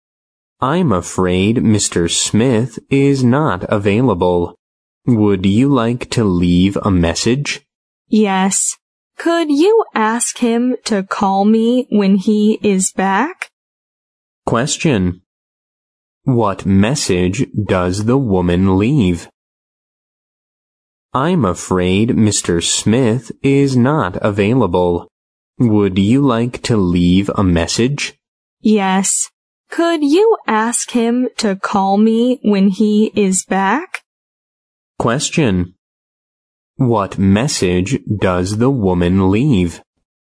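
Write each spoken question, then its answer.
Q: What message does the woman leave?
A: Ask Mr. Smith to call her when he is back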